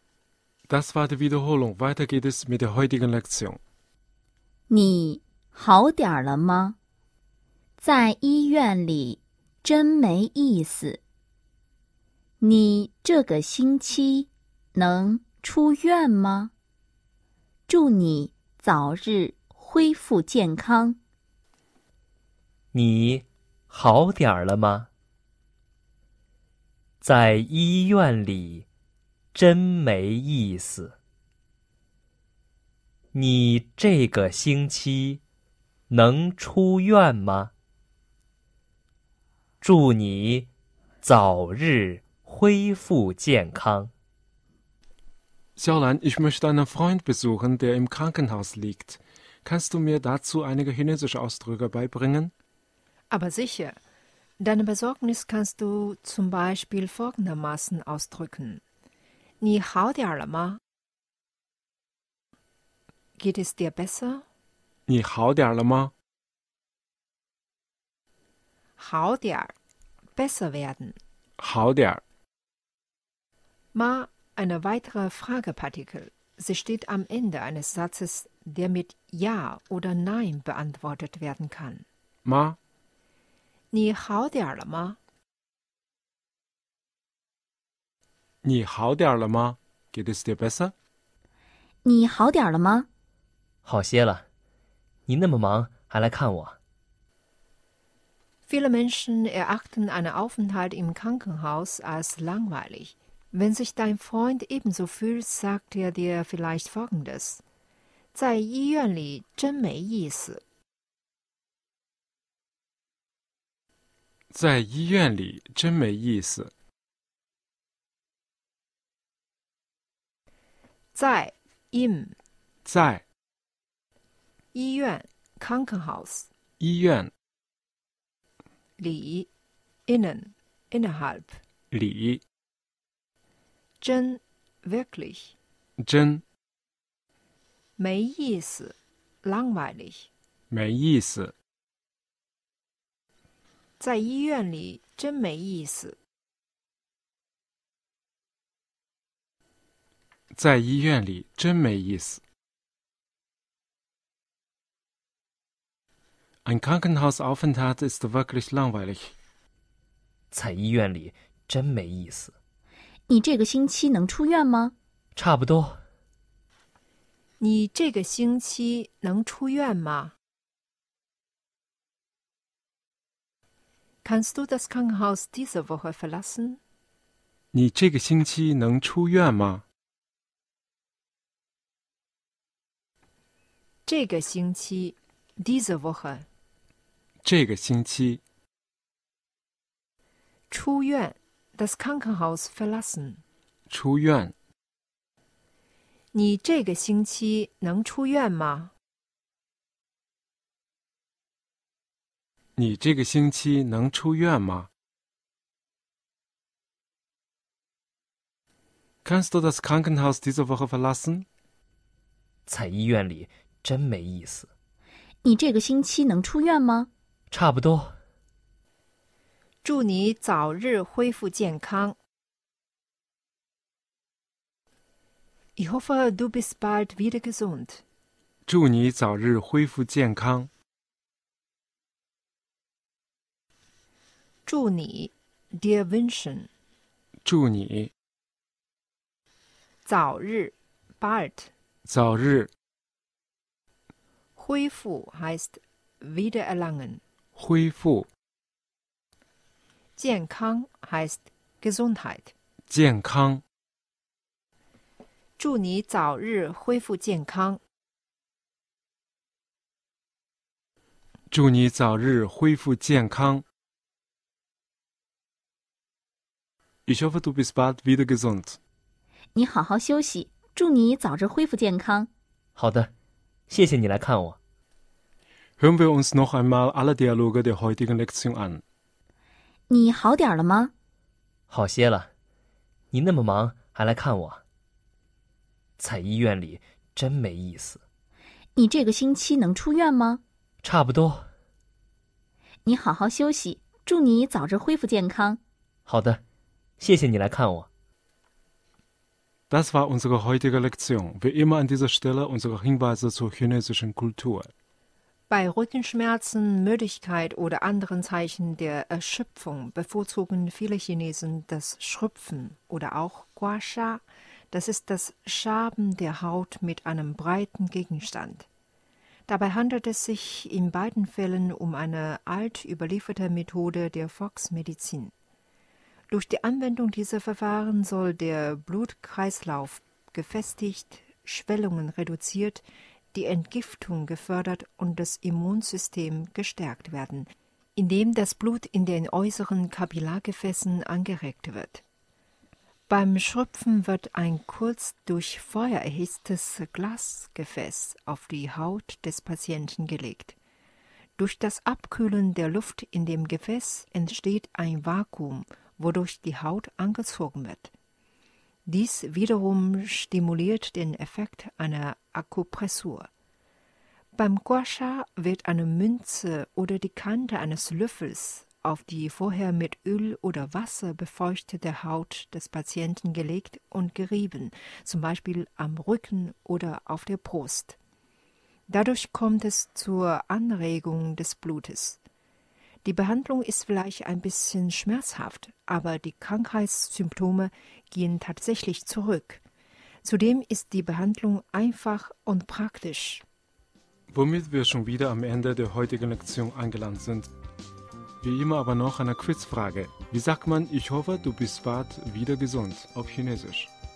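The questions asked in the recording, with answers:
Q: Wie sagt man, ich hoffe, du bist bald wieder gesund, auf Chinesisch?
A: 祝你早日恢复健康。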